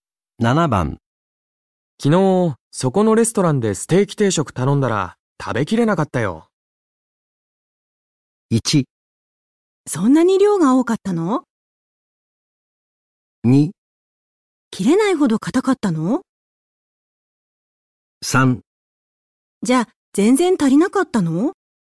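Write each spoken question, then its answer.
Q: 昨日、そこのレストランでステーキ定食頼んだら食べきれなかったよ。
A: 1: そんなに量が多かったの?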